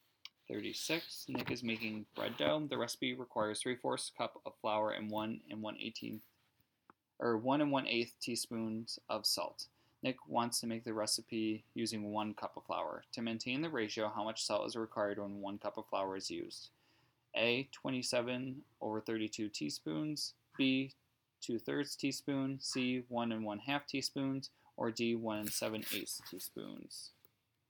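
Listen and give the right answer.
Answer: C: 1 1/2 teaspoons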